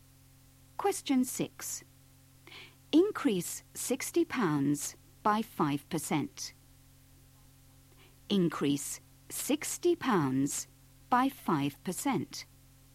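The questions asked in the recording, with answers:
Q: Increase £60 by 5%.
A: £63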